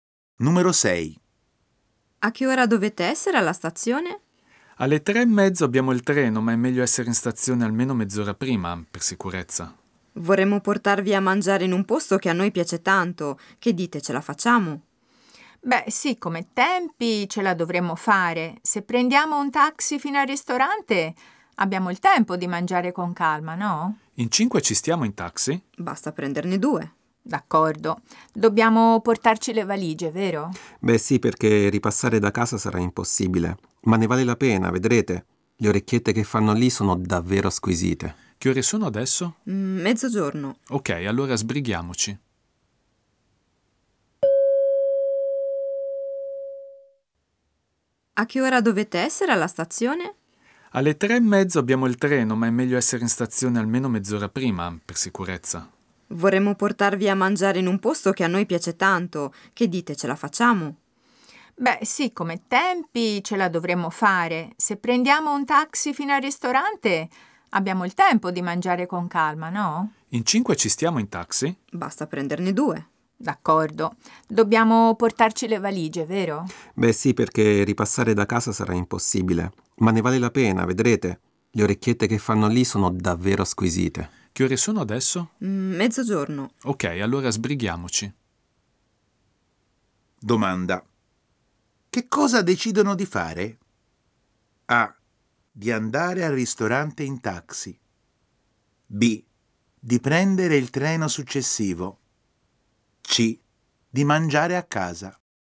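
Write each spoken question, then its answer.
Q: Che cosa decidono di fare?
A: A: Di andare al ristorante in taxi.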